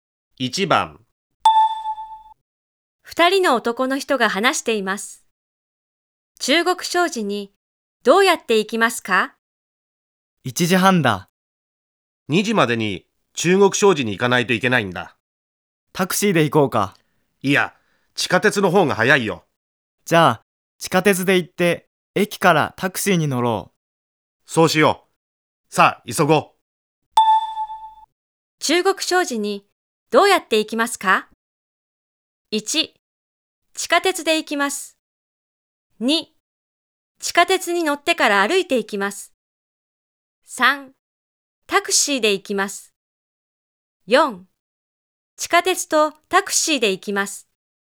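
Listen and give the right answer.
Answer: 4: 地下鉄とタクシーで行きます。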